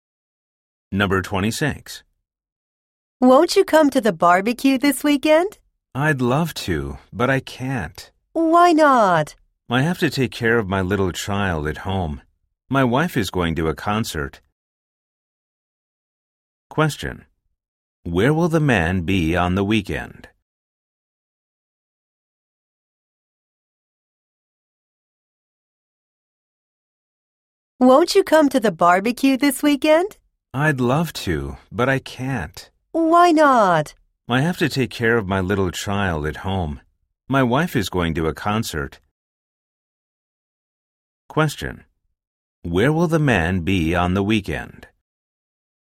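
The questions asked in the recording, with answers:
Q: Where will the man be on the weekend?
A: At home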